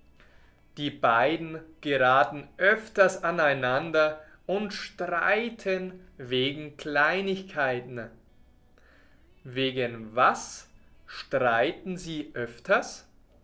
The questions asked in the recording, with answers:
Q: Wegen was? Streiten Sie öfters?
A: Wegen Kleinigkeiten. Sie streiten öfters wegen Kleinigkeiten.